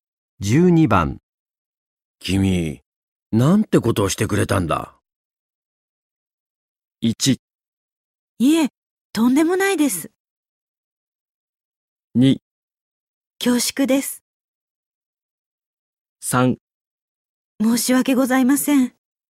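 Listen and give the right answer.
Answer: 3: 申し訳ございません。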